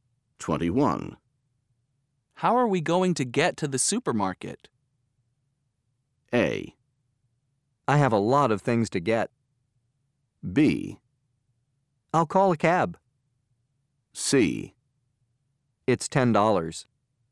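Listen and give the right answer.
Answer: B: I'll call a cab.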